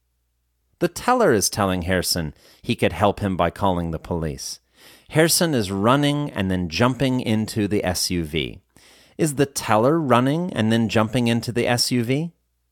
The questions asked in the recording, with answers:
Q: Is the teller running and then jumping into the SUV?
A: No, the teller isn't running and then jumping into the SUV.